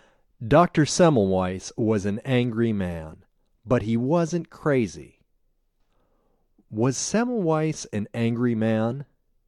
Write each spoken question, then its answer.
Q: Was Semmelweis an angry man?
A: Yes, he was an angry man.